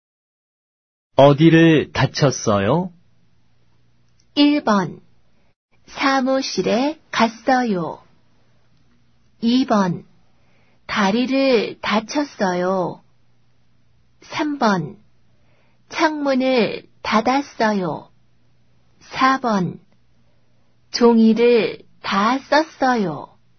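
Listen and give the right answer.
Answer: 2번: 다리를 다쳤어요.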